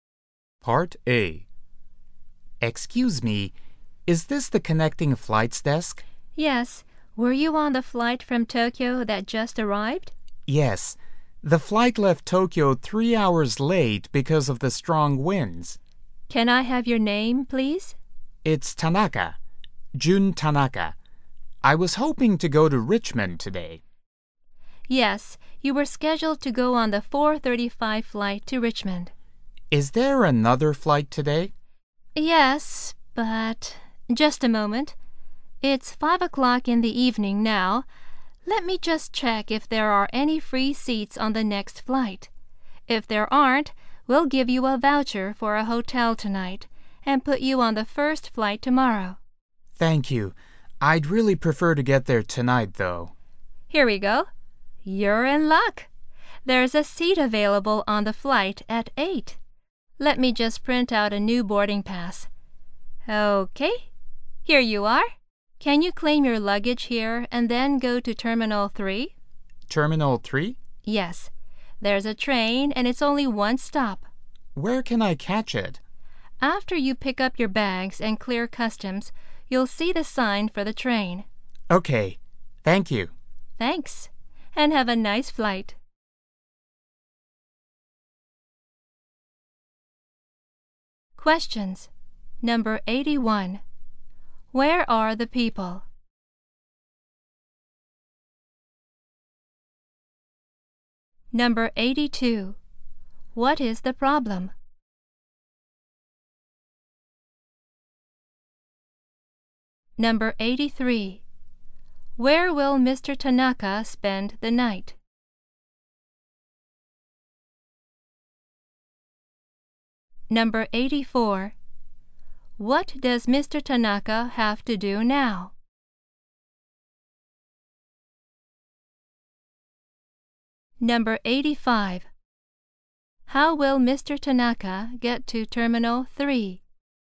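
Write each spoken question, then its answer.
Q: Where are the people?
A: At the connecting flights desk in an airport

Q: What is the problem?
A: His flight was late and he missed his connecting flight

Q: What does Mr. Tanaka have to do now?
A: Claim his luggage

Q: How will Mr. Tanaka get to Terminal 3?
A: By train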